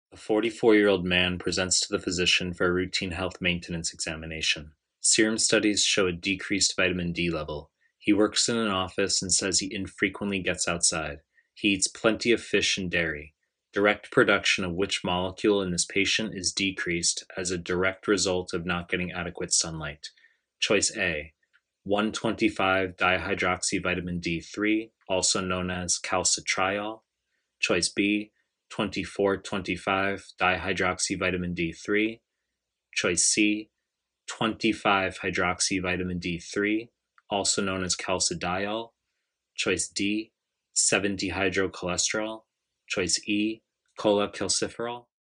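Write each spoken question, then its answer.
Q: Direct production of which molecule in this patient is decreased as a direct result of not getting adequate sunlight?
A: E: cholecalciferol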